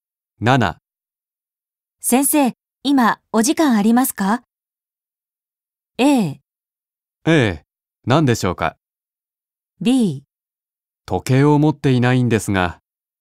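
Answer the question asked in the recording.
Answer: A: ええ、何でしょうか。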